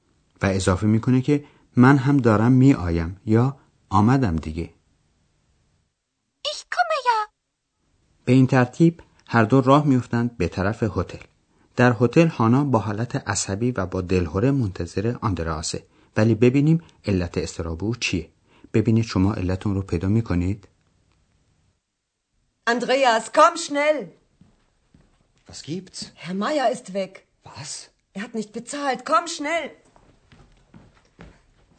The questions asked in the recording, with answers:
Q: ولی ببینیم علت استراب او چیه ببینید شما علتون رو پیدا کنید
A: حتما متوجه شدید که علت تشویش هانا اینه که آقای مایر مهمانخانه رو ترک کرده و رفته.